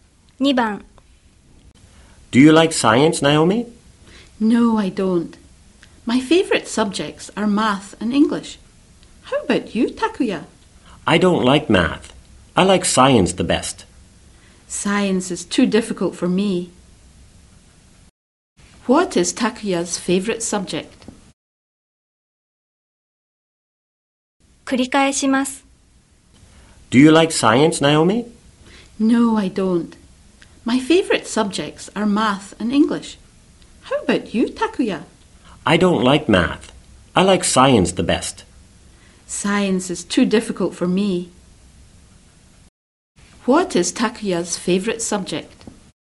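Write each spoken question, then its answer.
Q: What is Takuya's favorite subject?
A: Science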